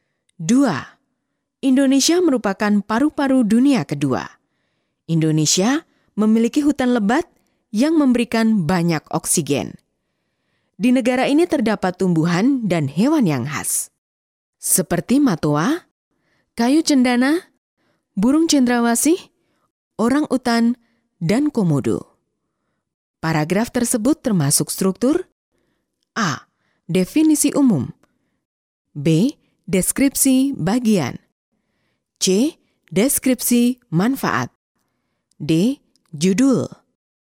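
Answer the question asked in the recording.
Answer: B: Deskripsi bagian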